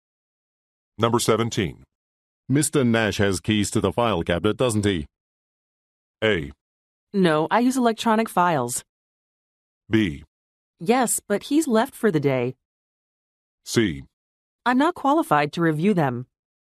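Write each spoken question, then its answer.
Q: Mr. Nash has keys to the file cabinet, doesn't he?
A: B: Yes, but he's left for the day.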